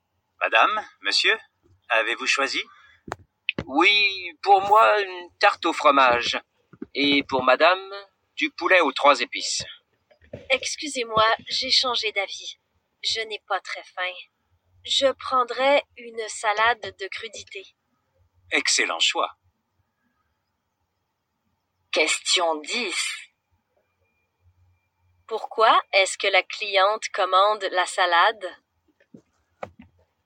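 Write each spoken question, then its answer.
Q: Pourquoi est-ce que la cliente commande la salade?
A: Elle n'a pas très faim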